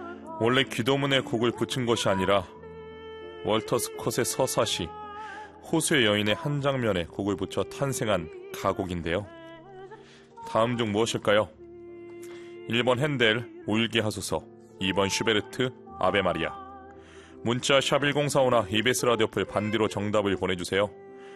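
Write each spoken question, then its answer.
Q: 다음 중 무엇일까요? 1번 핸델 울게 하소서, 2번 슈베르트 아베 마리아.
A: 2: 슈베르트 아베 마리아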